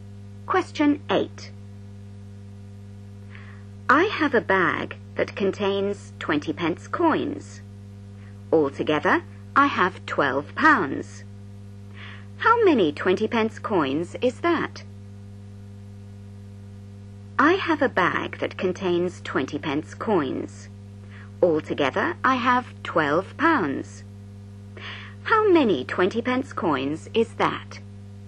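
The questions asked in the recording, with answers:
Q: How many 20 pence coins is that?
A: 60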